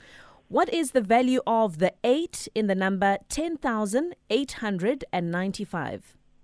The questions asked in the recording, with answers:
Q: What is the value of the 8 in the number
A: It is 800.